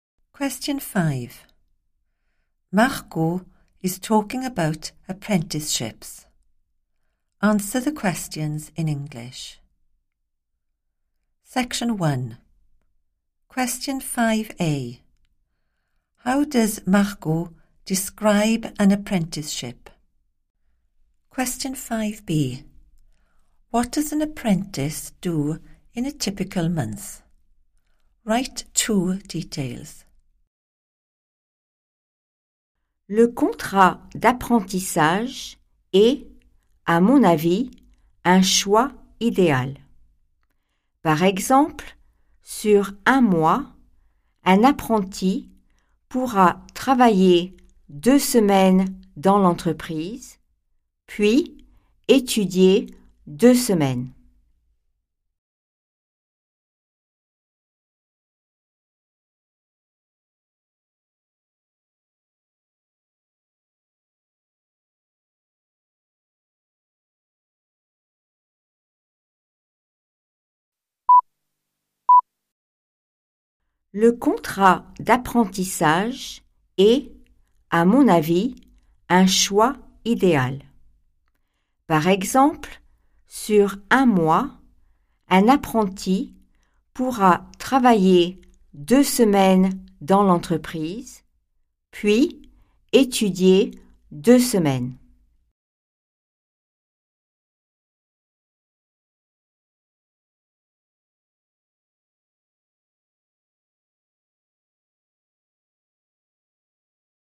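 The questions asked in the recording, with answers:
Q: How does Marco describe an apprenticeship?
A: an ideal choice

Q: What does an apprentice do in a typical month?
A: works two weeks in the company, then studies two weeks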